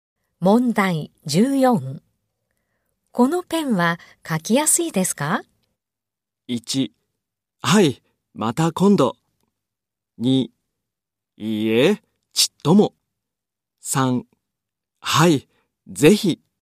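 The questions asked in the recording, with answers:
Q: このペンは書きやすいですか?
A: 1: いいえ、ちっとも。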